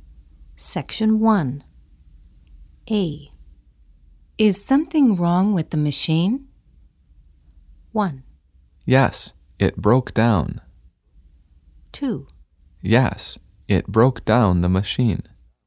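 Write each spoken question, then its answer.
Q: Is something wrong with the machine?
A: 1: Yes, it broke down.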